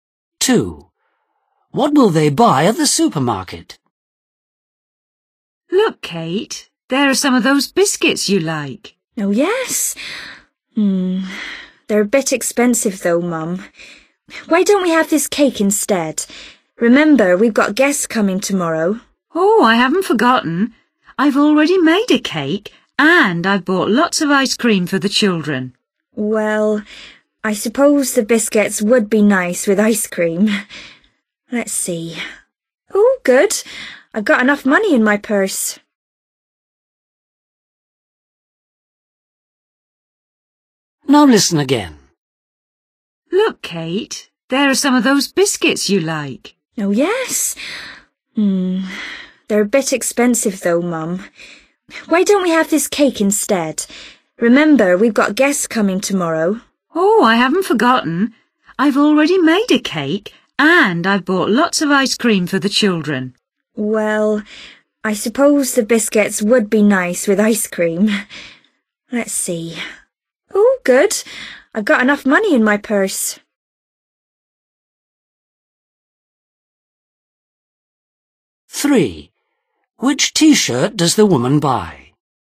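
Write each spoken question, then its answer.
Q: What will they buy at the supermarket?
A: biscuits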